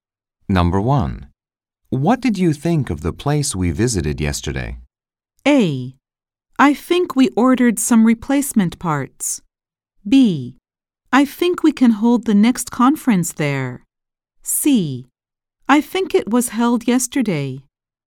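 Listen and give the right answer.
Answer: B: I think we can hold the next conference there.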